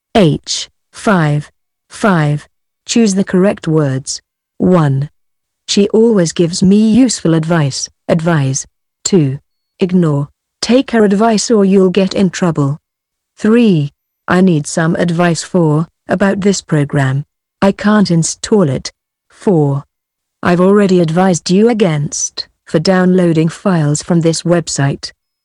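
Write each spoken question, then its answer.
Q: She always gives me useful advice, advise.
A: advice

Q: Ignore, take her advice or you'll get in trouble.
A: take

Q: I need some advice for, about this program.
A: about

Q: I've already advised you against, for downloading files from this website.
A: against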